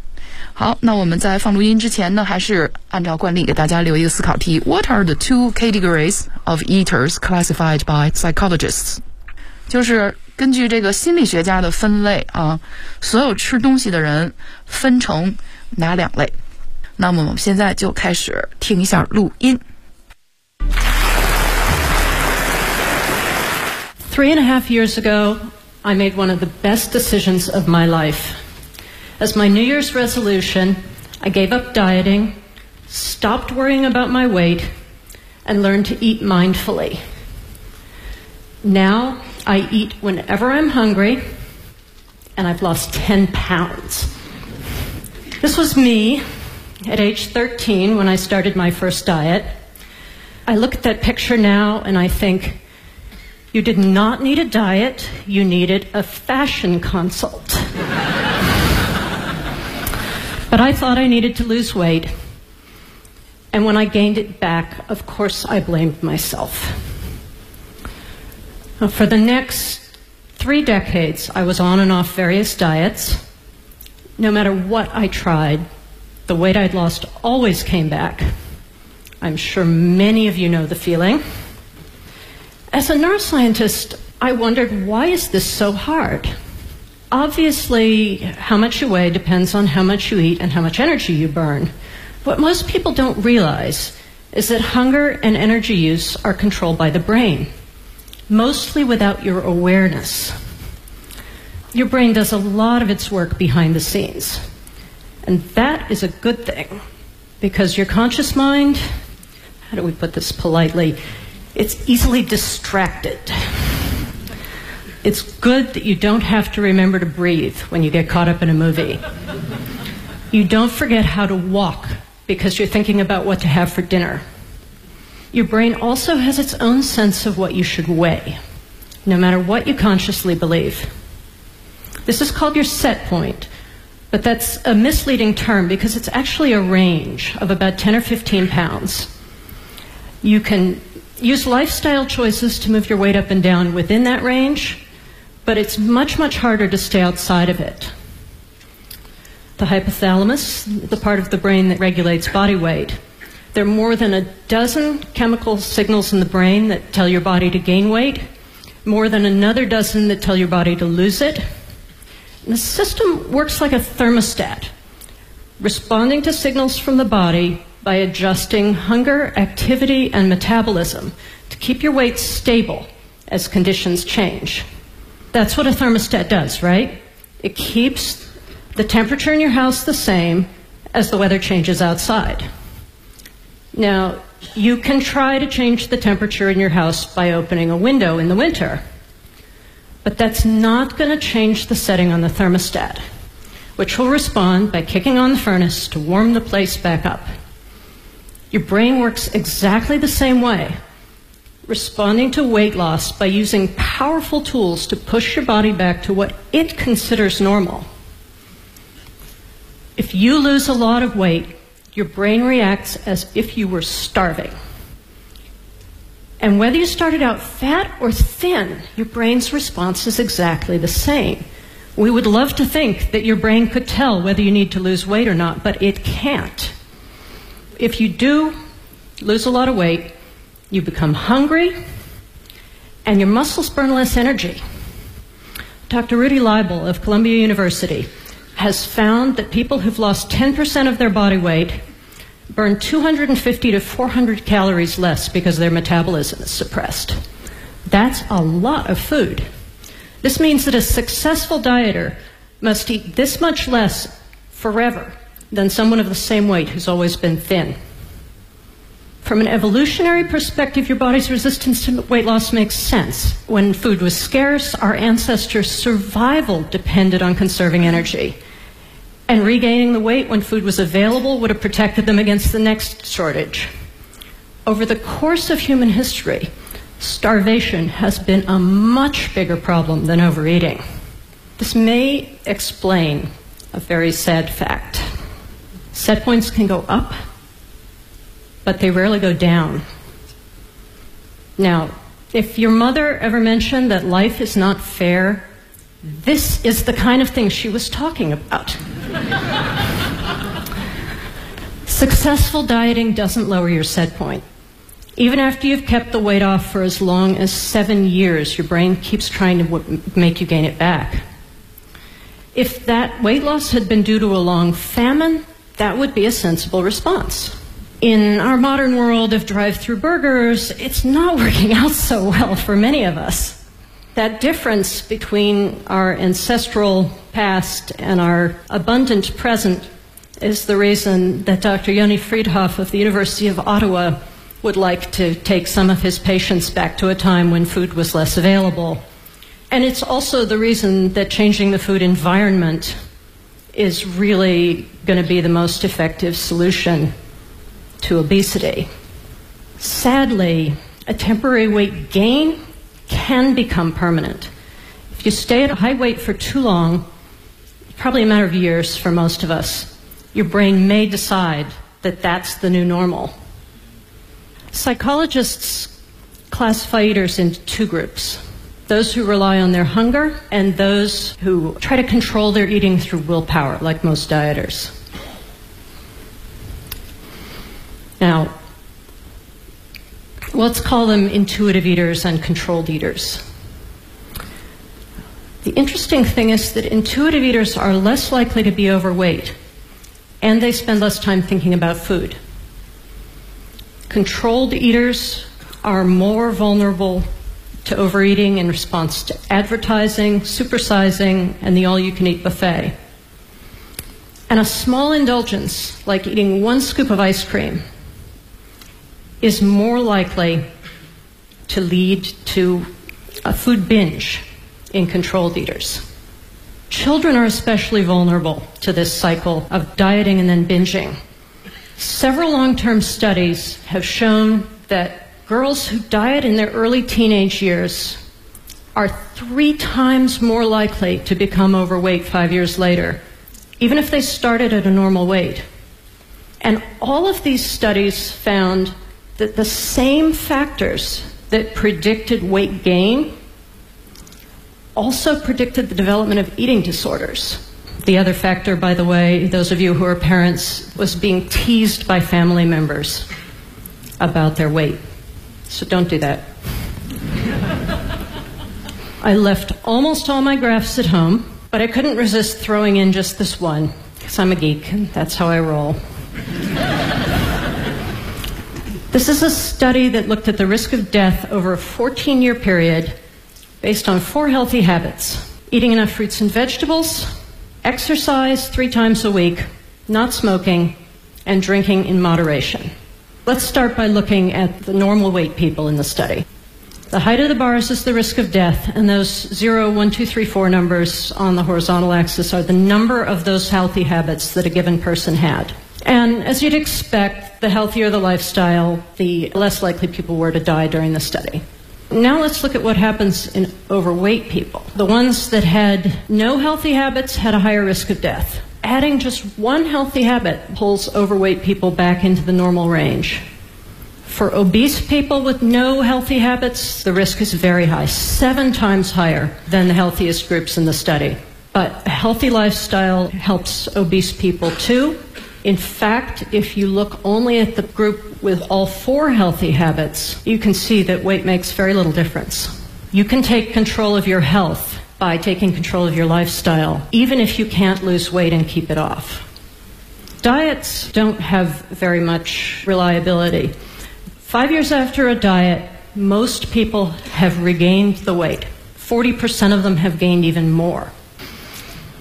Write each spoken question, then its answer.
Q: What are the two categories of eaters classified by psychologists?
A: Let's call them intuitive eaters and controlled eaters。